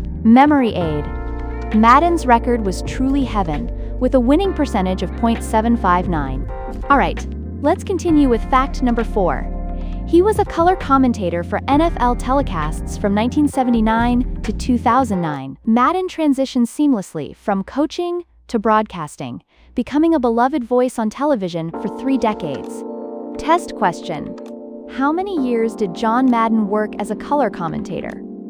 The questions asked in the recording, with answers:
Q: How many years did John Madden work as a color commentator?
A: Correct answer, 30 years.